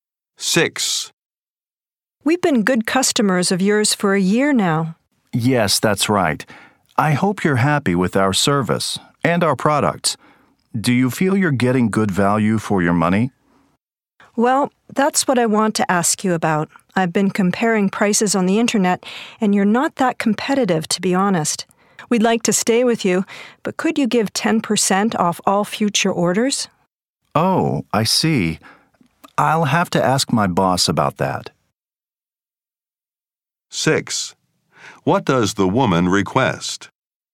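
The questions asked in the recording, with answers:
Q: What does the woman request?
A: 10% off all future orders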